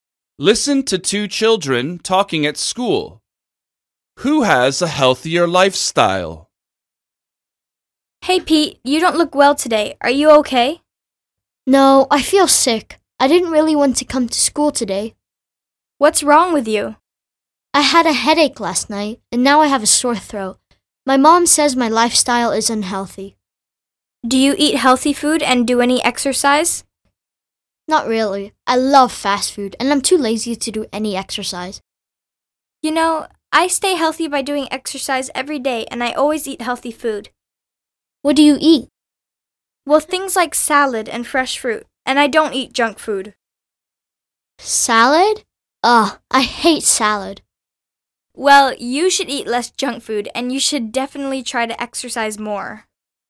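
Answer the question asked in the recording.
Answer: The girl who talks to Pete (not Pete)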